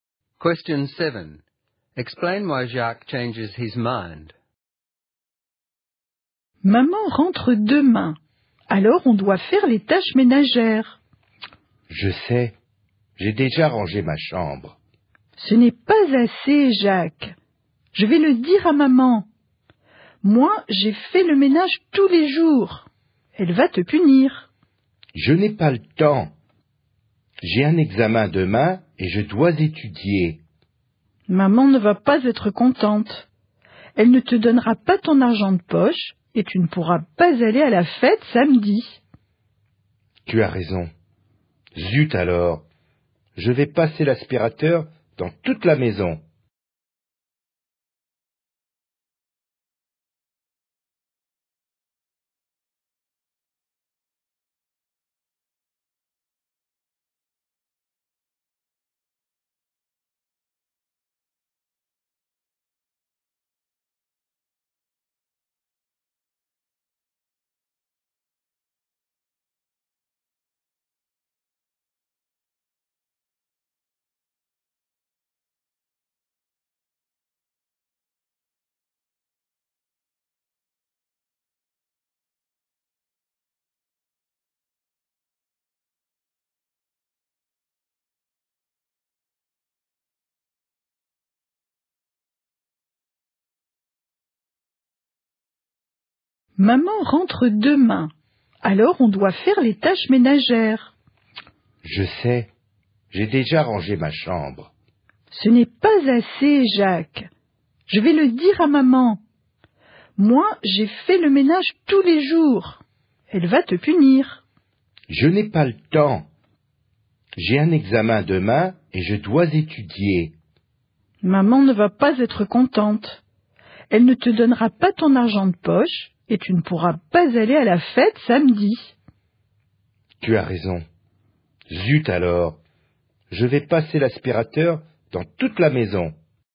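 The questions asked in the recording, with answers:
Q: Explain why Jacques changes his mind.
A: Mum won't be happy: she won't give him pocket money and he won't be able to go to the party on Saturday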